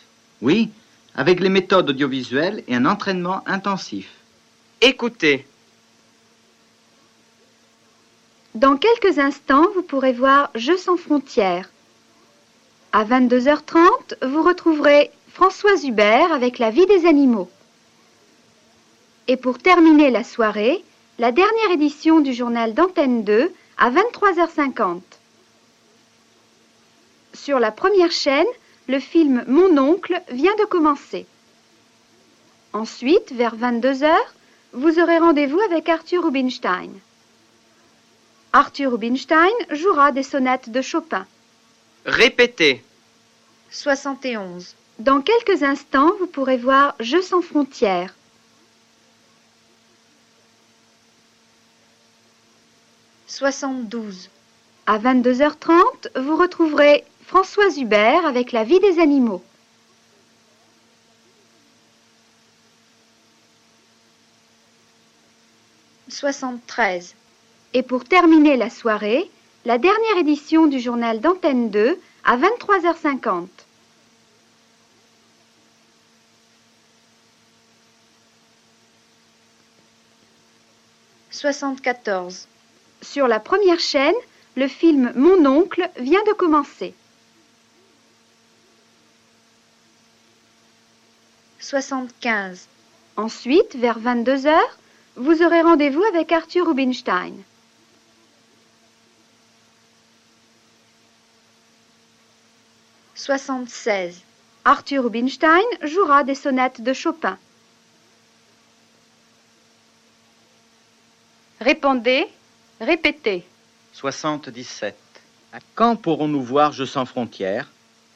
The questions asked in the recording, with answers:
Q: À quand pourrons-nous voir Je sans frontières?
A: Dans quelques instants, vous pourrez voir Je sans frontières.